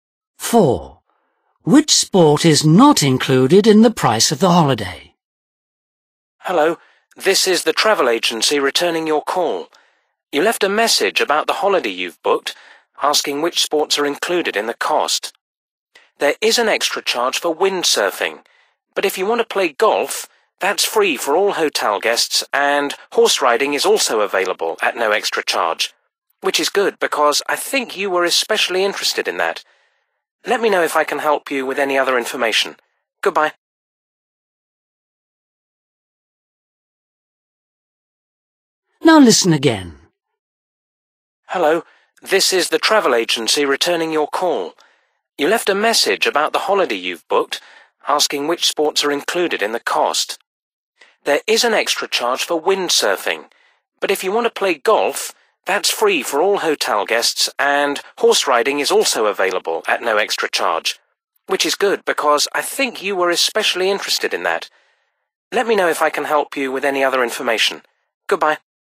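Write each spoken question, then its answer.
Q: Which sport is not included in the price of the holiday?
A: windsurfing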